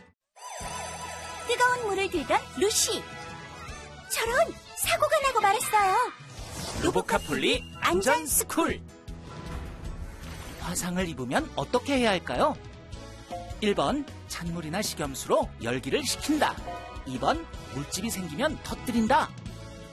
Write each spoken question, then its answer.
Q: 화상을 입으면 어떻게 해야 할까요?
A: 정답은 1번. 찬물이나 식염수로 열기를 식히고 깨끗한 거즈로 상처 부위를 감싸줘요.